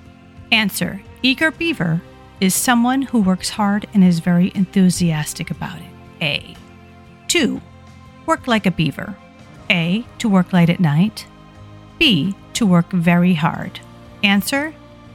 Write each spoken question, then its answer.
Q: Work like a beaver. A. To work late at night. B. To work very hard.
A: Work like a beaver is B. To work very hard.